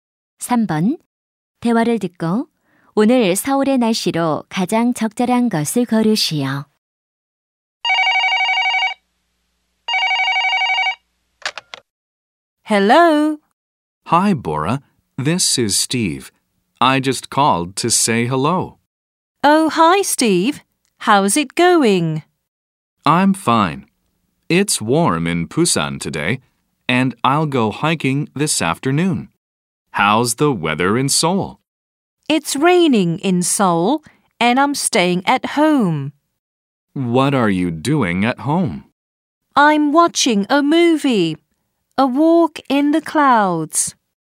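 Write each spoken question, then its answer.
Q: 대화를 듣고 오늘 서울의 날씨로 가장 적절한 것을 고르시오.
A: 비가 옴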